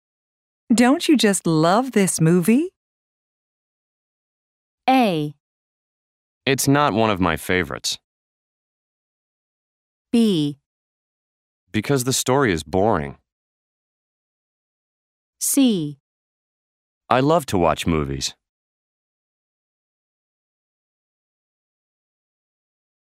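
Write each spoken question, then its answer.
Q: Don't you just love this movie?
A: A: It's not one of my favorites.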